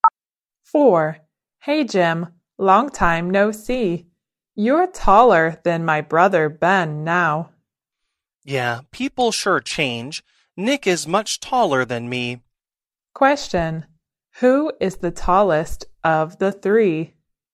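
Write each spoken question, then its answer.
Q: Who is the tallest of the three?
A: Nick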